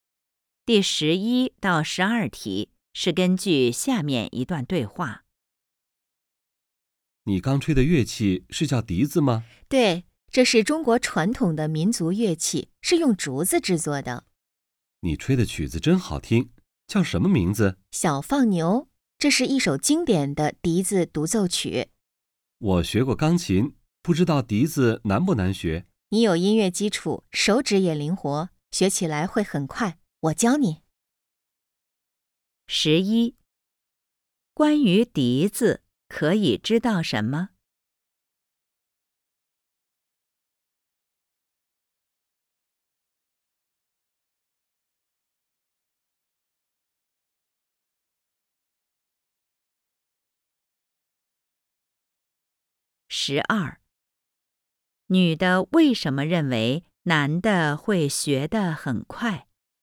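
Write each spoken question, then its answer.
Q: 关于笛子,可以知道什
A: 是中国传统民族乐器,用竹子制作

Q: 女的为什么认为男的会学得很快?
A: 他有音乐基础,手指也灵活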